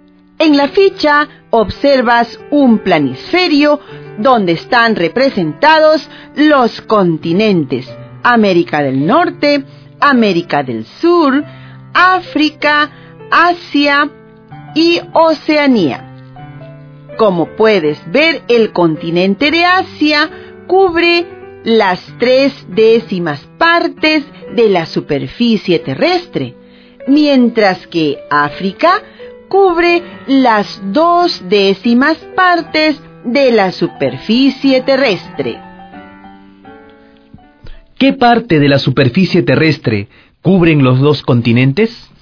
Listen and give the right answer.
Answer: Los dos continentes cubren 1/2 de la superficie terrestre.